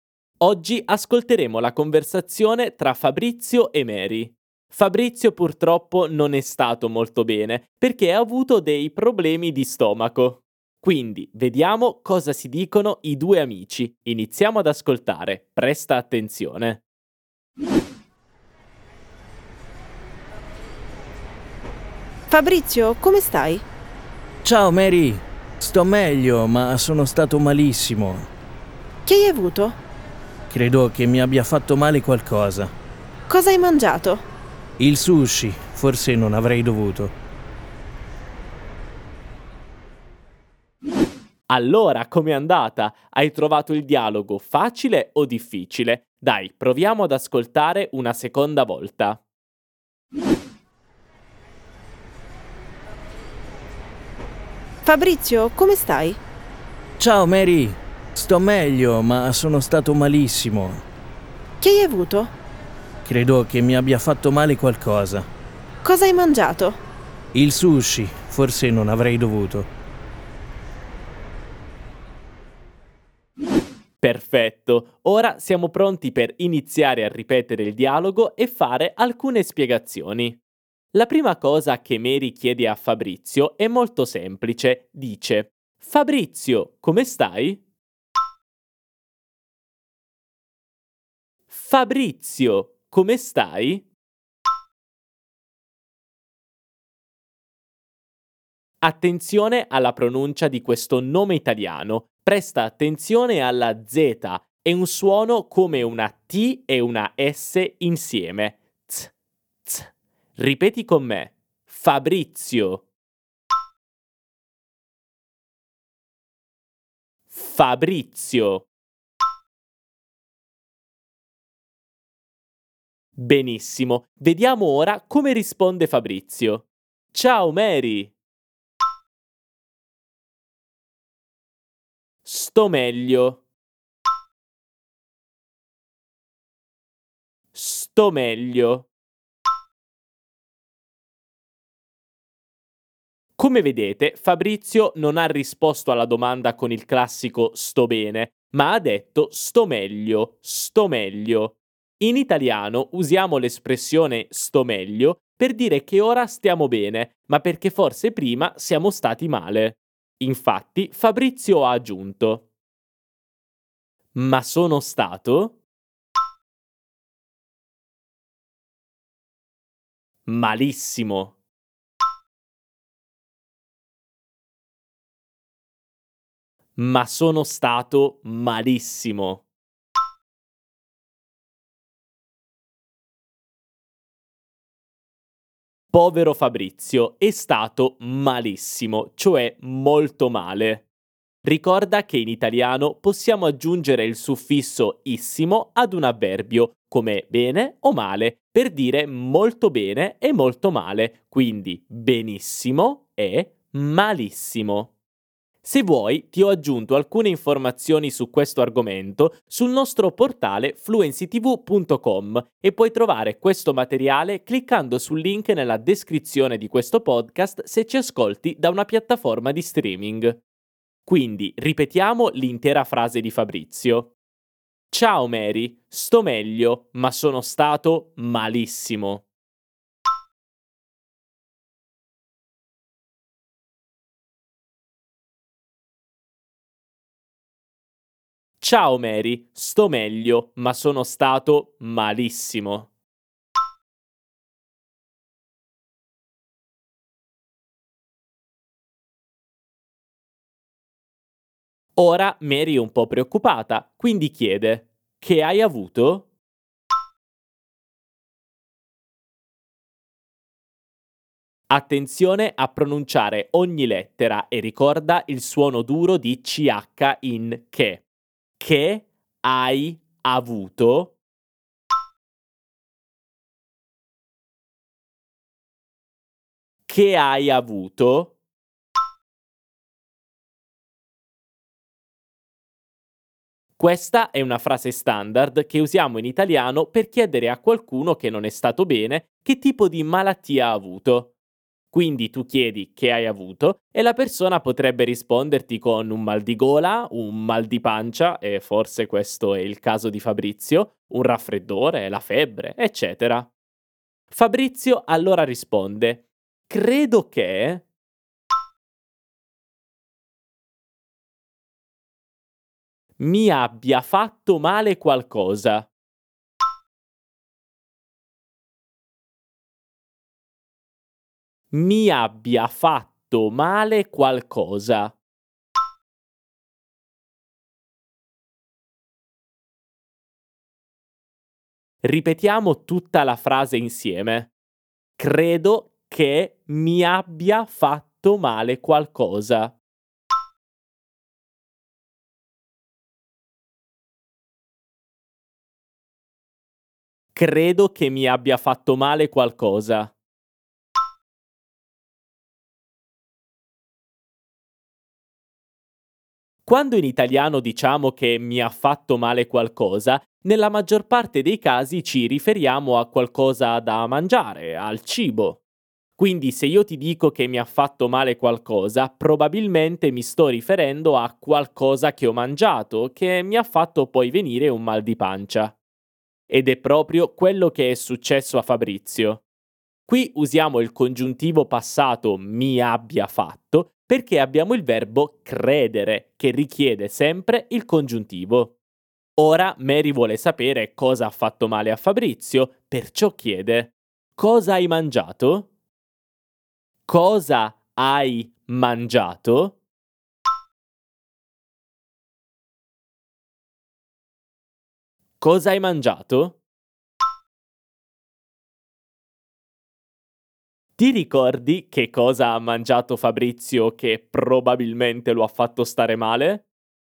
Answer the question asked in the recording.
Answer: Il sushi!